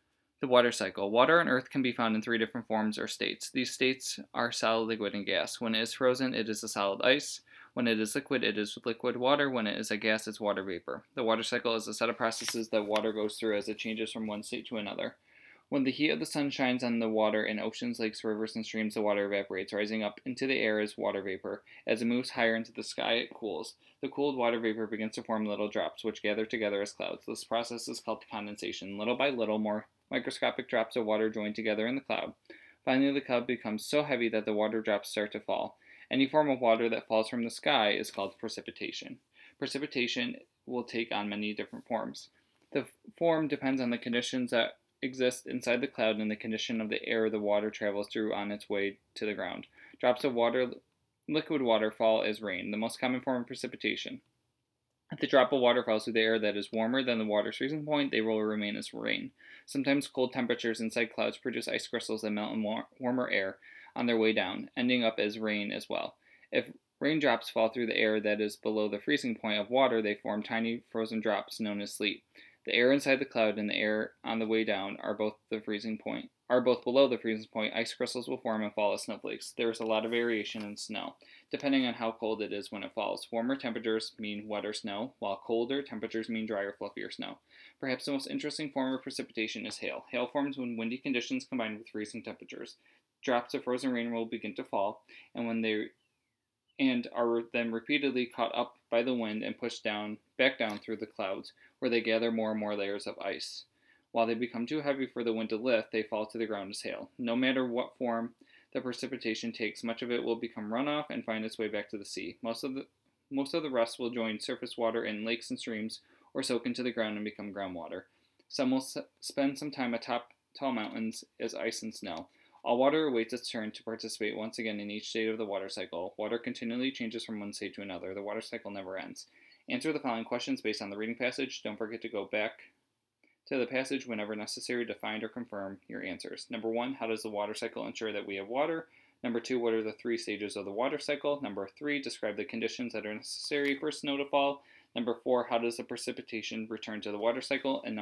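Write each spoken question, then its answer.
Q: how does the water cycle ensure that we have water?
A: Water keeps changing from one state to another and returns to the sea, lakes and the ground, so the cycle never ends.

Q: what are the three stages of the water cycle?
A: Evaporation, condensation and precipitation

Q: describe the conditions that are necessary for snow to fall.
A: The air in the cloud and the air on the way down must both be below freezing.

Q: how does the precipitation return to the water cycle?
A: It runs off to the sea, joins lakes and streams, or soaks into the ground as groundwater.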